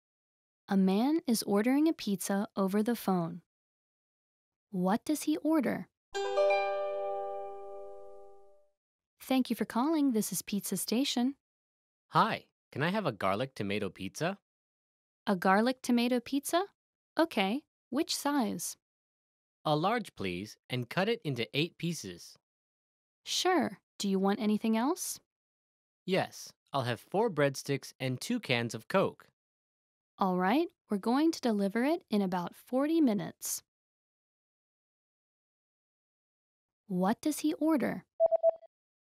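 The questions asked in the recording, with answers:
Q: What does he order?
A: A large garlic tomato pizza, 4 breadsticks and 2 cans of Coke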